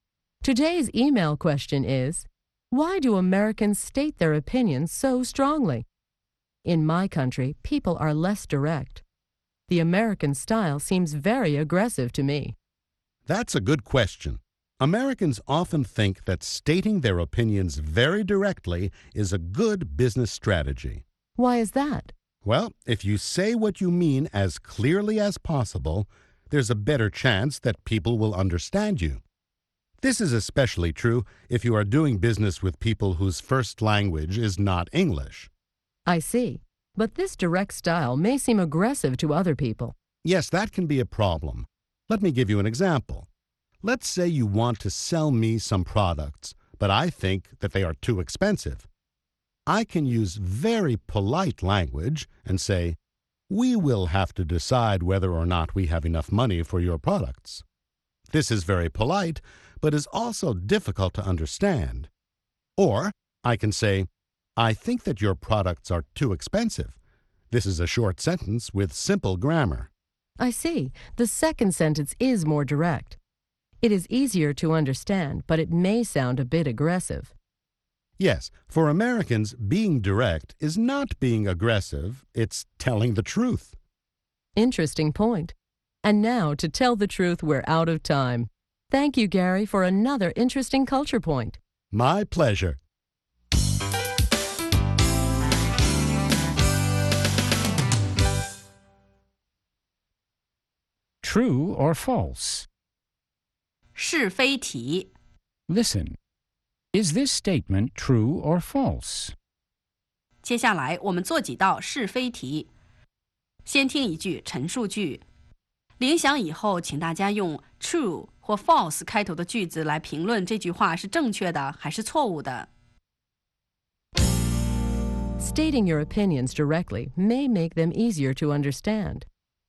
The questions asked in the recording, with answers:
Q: Stating your opinions directly may make them easier to understand.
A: True.Especially when the sentences are short and the grammar is simple.